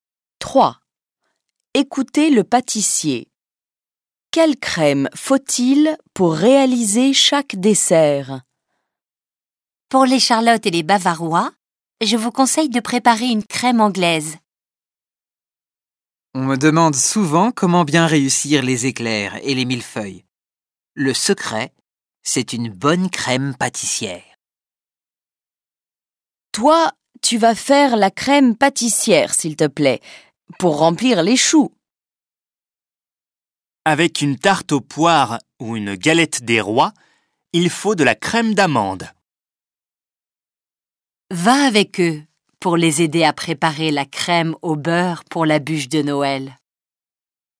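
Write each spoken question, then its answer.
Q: Quelle crème faut-il pour réaliser chaque dessert?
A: Charlottes et bavarois : crème anglaise ; éclairs, millefeuilles et choux : crème pâtissière ; tarte aux poires et galette des rois : crème d'amande ; bûche de Noël : crème au beurre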